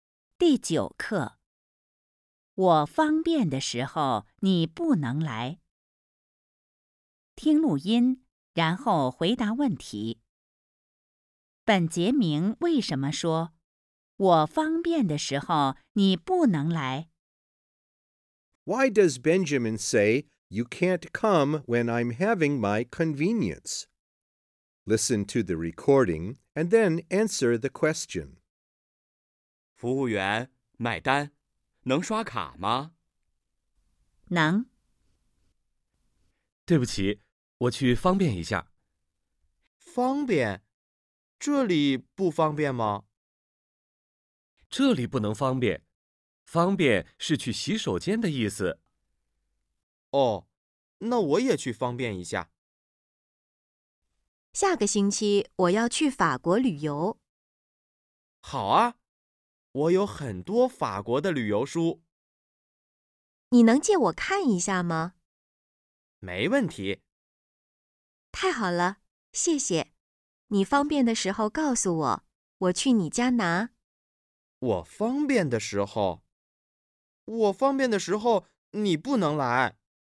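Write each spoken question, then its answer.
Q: 本杰明为什么说我方便的时候你不能来?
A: 因为他以为"方便"是去洗手间的意思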